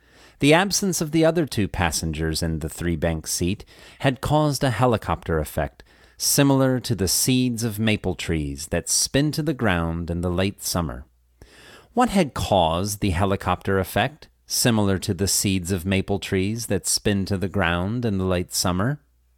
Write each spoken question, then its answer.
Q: What had caused the helicopter effect, similar to the seeds of maple trees that spin to the ground in the late summer?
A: The absence of the other two passengers in the three-bank seat had caused a helicopter effect.